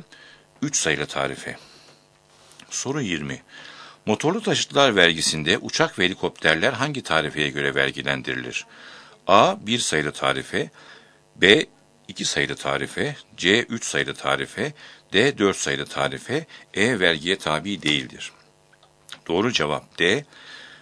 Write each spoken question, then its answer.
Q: Motorlu taşıtlar vergisinde uçak ve helikopterler hangi tarifeye göre vergilendirilir?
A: Doğru cevap D. 4 sayılı tarife.